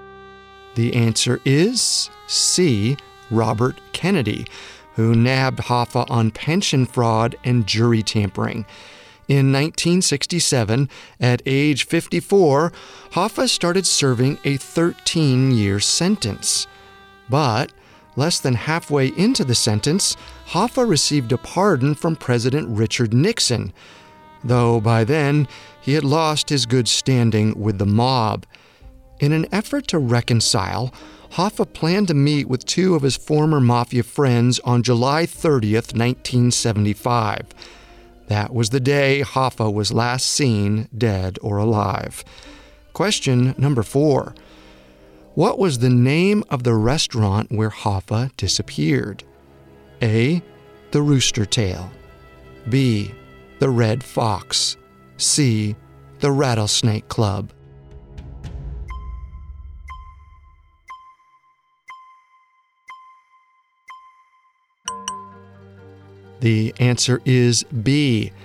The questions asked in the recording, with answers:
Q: What was the name of the restaurant where Hoffa disappeared?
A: The answer is B.